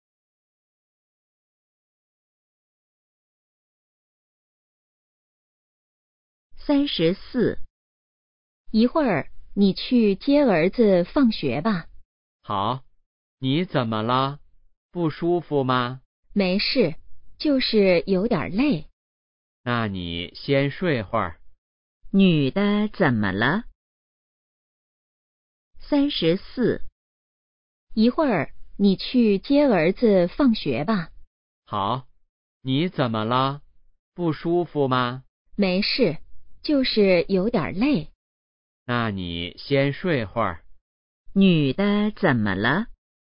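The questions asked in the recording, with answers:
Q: 女的怎么了?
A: 有点累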